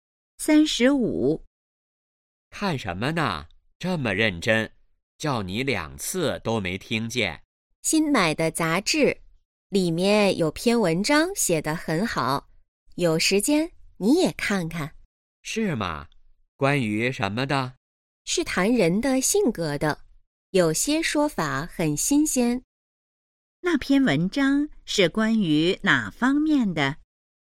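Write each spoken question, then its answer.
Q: 那篇文章是关于哪方面的?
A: 人的性格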